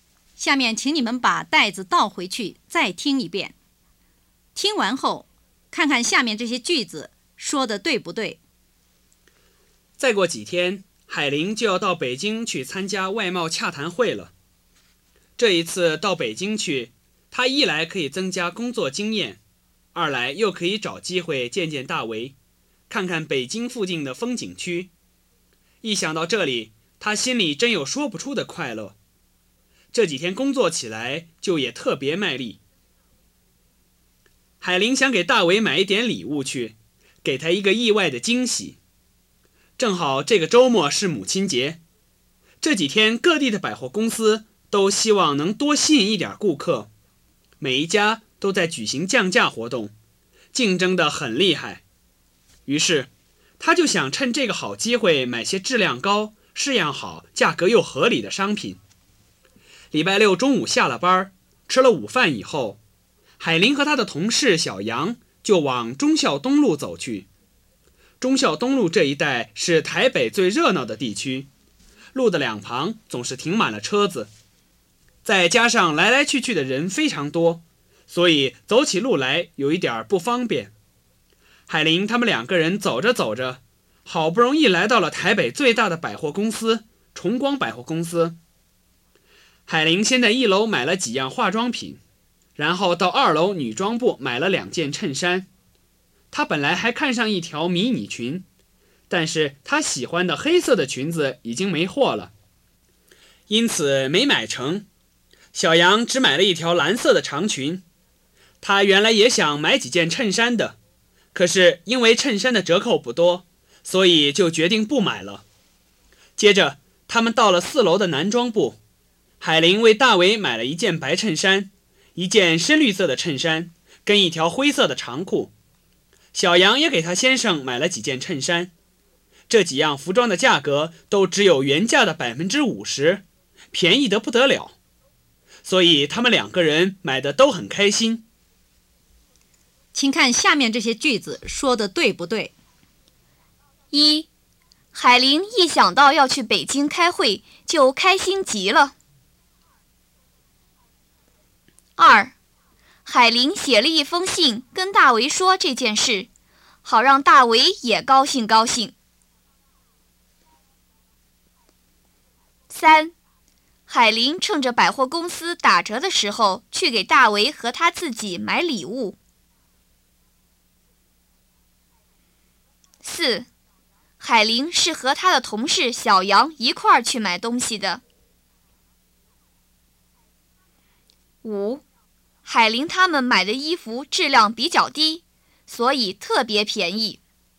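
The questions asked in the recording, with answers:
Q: 海林写了一封信跟大为说这件事,好让大为也高兴高兴。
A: 不对

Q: 海林他们买的衣服质量比较低,所以特别便宜。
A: 不对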